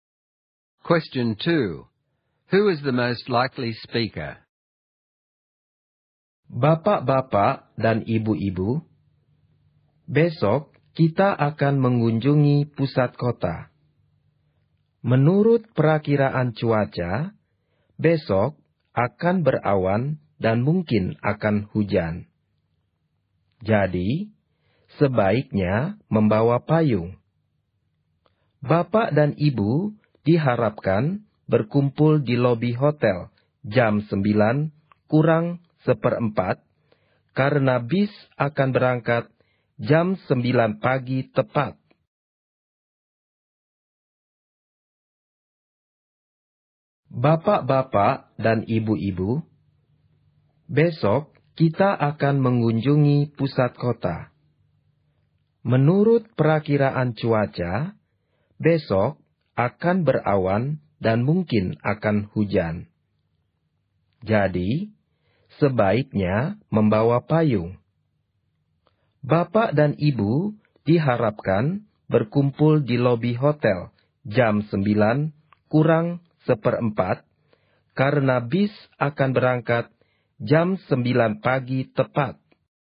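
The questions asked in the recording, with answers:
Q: Who is the most likely speaker?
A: A tour guide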